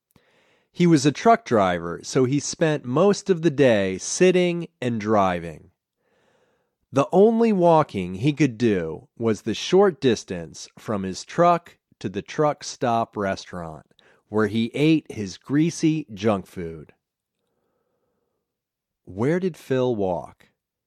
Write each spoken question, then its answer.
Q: Where did Phil walk?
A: Phil only walked from his truck to the truck stop restaurant.